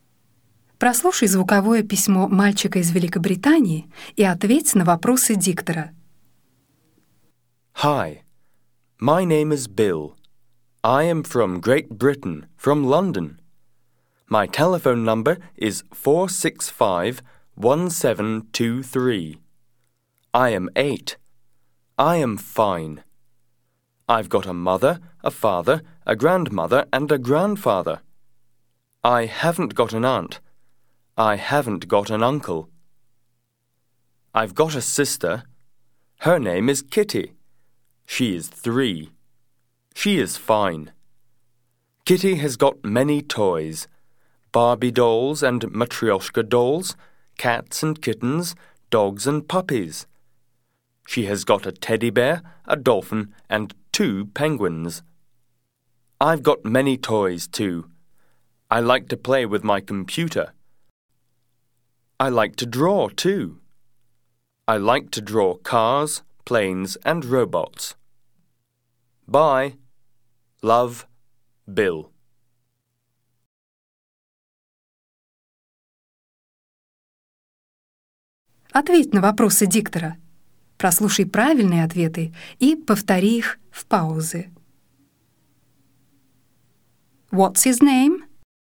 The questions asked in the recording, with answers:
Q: What's his name?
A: His name is Bill.